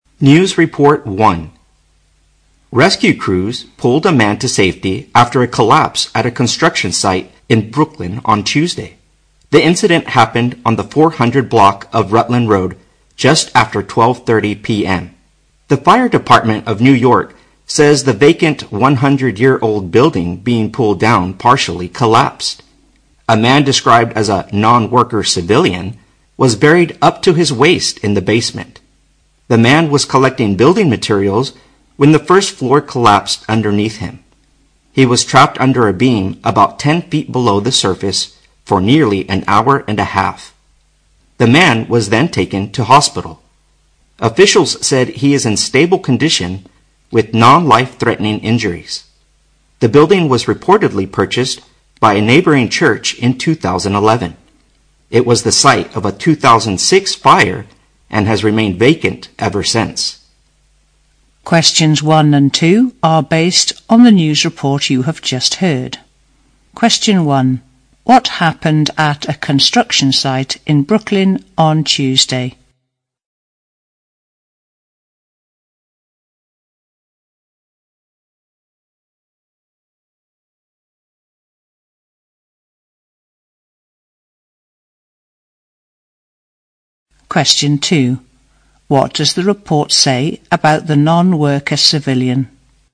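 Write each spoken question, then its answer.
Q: What happened at a construction site in Brooklyn on Tuesday?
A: A vacant old building being pulled down partially collapsed and a man was trapped.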